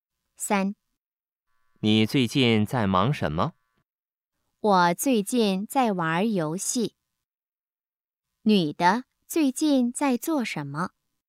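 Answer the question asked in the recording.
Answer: 玩游戏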